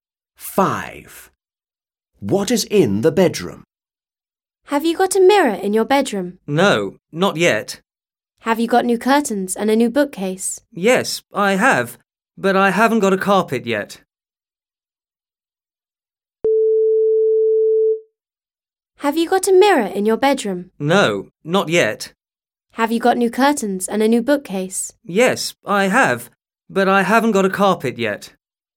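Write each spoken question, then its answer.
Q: What is in the bedroom?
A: new curtains and a new bookcase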